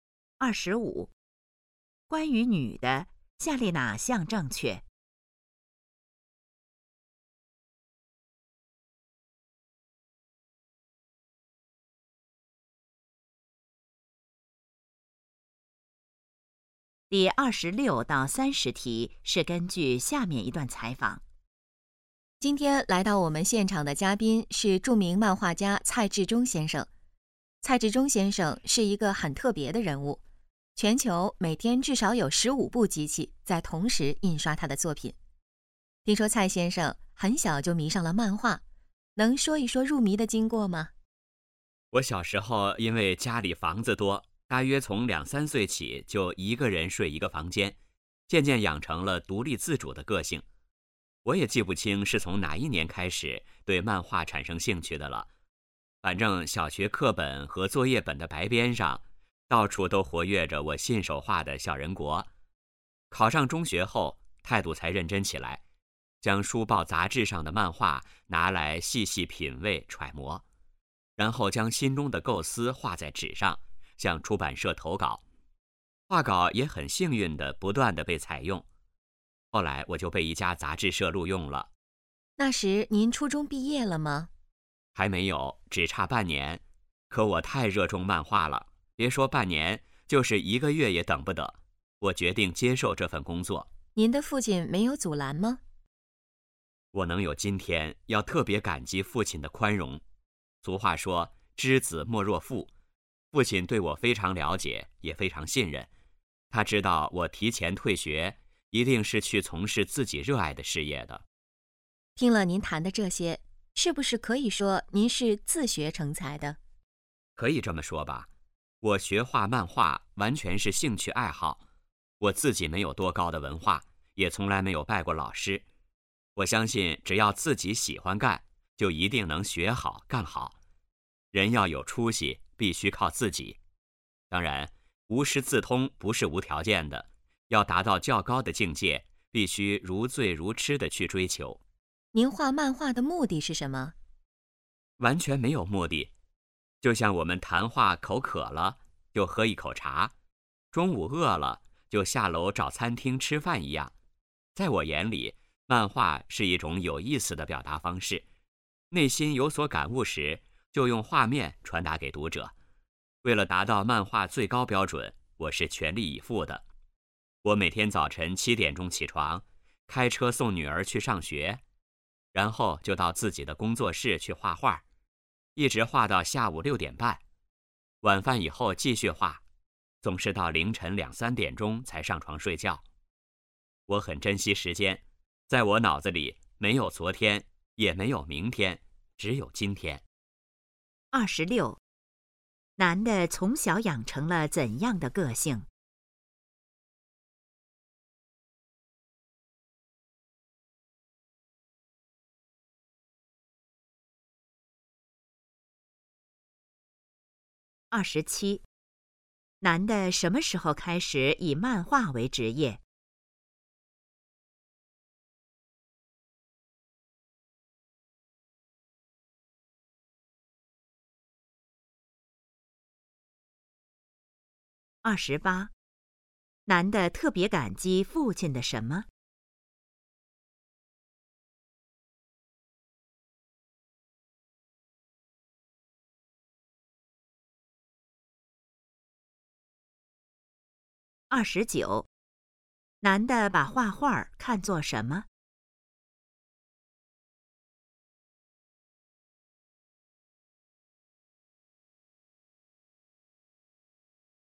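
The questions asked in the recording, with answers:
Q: 男的从小养成了怎样的个性?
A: 独立自主

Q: 男的什么时候开始以漫画为职业?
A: 初中毕业前半年

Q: 男的特别感激父亲的什么?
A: 宽容

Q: 男的把画画看作什么?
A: 一种有意思的表达方式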